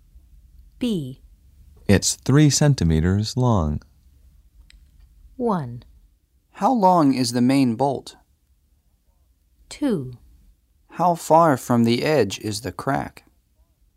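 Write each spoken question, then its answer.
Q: It's 3 centimeters long.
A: 1: How long is the main bolt?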